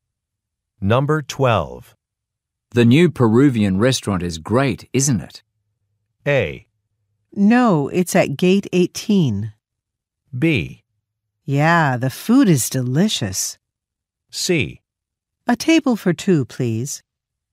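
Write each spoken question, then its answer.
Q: The new Peruvian restaurant is great, isn't it?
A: B: Yeah, the food is delicious.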